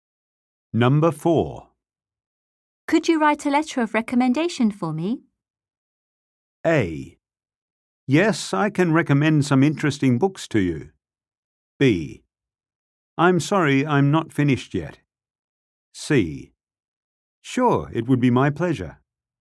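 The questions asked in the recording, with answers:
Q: Could you write a letter of recommendation for me?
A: C: Sure, it would be my pleasure.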